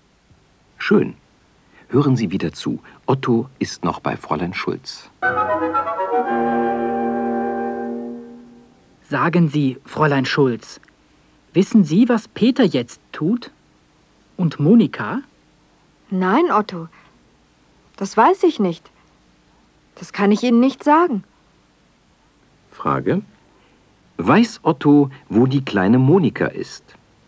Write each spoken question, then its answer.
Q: Weiß Otto, wo die kleine Monika ist?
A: Nein, er weiß nicht, wo Monika ist.